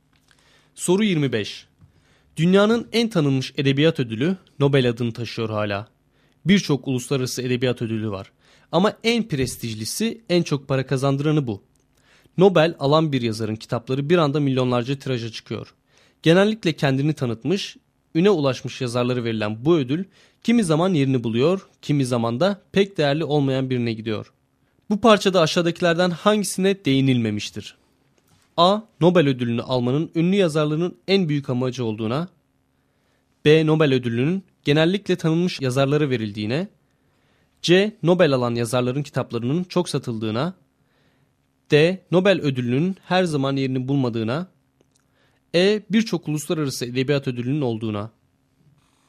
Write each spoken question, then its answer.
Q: Bu parçada aşağıdakilerden hangisine değinilmemiştir?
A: Doğru cevap A şıkkı.